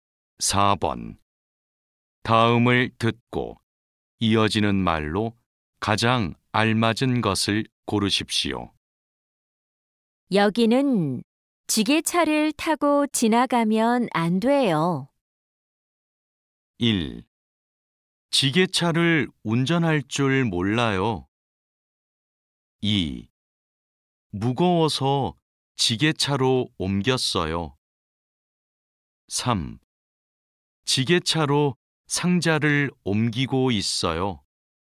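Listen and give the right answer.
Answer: 4: 지게차가 다닐 수 없는지 몰랐어요.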